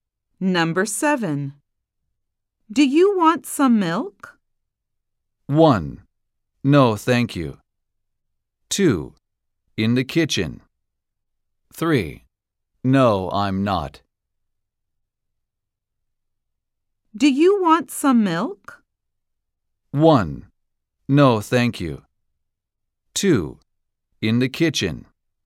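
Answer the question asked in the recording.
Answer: 1: No, thank you.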